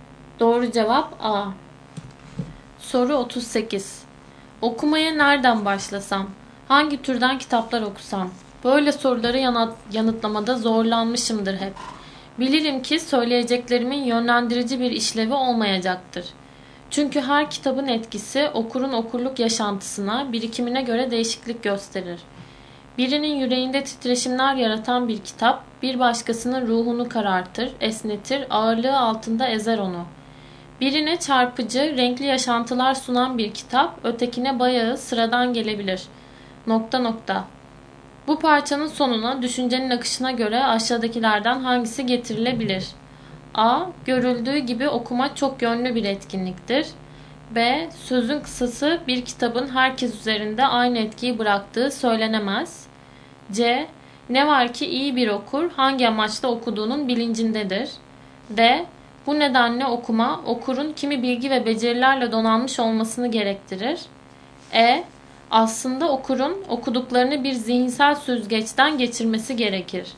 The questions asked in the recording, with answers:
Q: Bu parçanın sonuna düşüncenin akışına göre aşağıdakilerden hangisi getirilebilir?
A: Doğru cevap B.